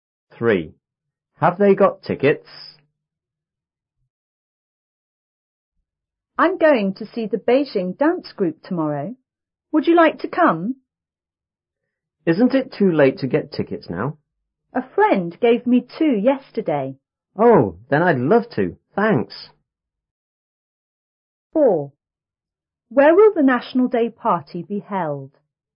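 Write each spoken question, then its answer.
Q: Have they got tickets?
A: Yes, a friend gave two.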